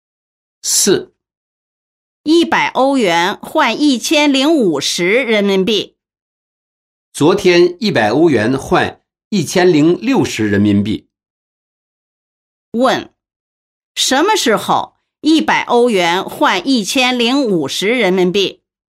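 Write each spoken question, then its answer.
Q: 什么时候100欧元换1050人民币?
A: 今天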